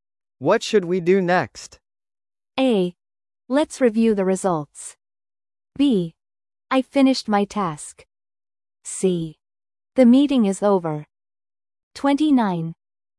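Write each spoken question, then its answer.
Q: What should we do next?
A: A: Let's review the results.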